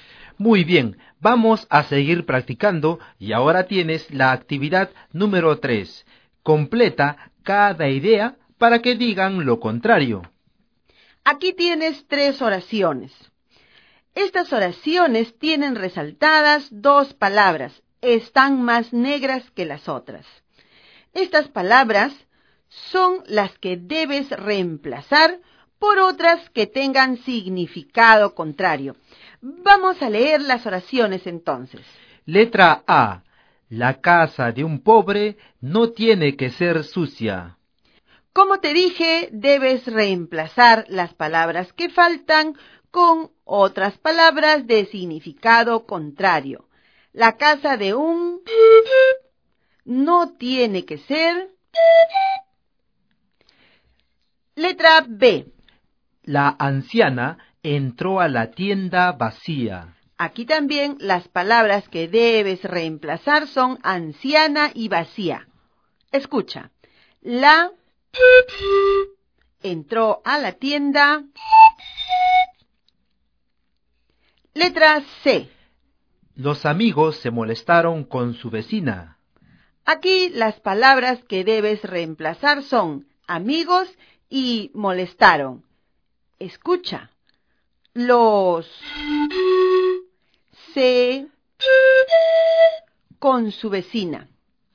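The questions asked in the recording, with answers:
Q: La casa de un no tiene que ser.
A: La casa de un rico no tiene que ser limpia.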